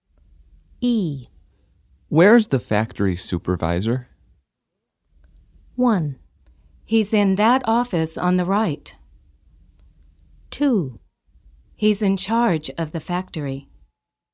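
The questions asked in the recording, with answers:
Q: Where's the factory supervisor?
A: 1: He's in that office on the right.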